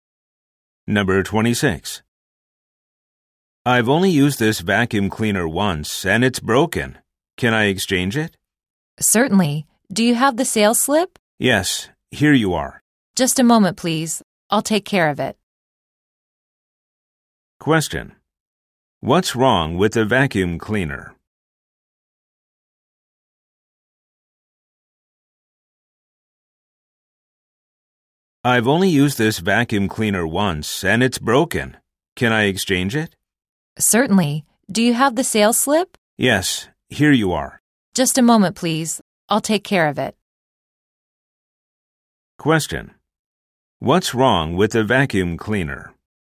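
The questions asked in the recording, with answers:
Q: What's wrong with the vacuum cleaner?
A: It broke after being used only once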